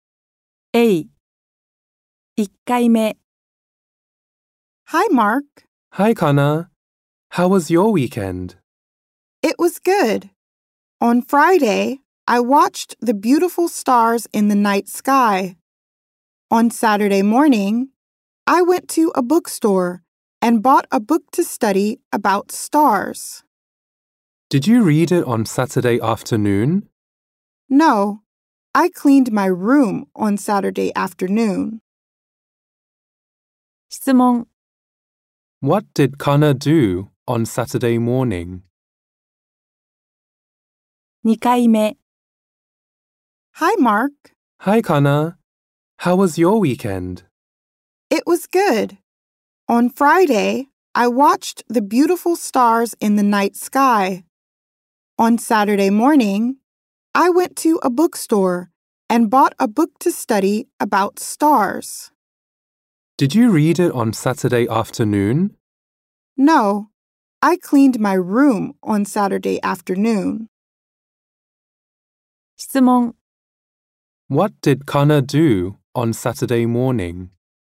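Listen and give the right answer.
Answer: She went to a bookstore and bought a book to study about stars.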